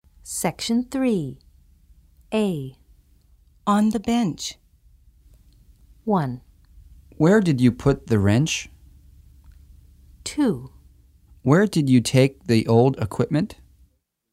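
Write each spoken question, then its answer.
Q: On the bench.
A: 1: Where did you put the wrench?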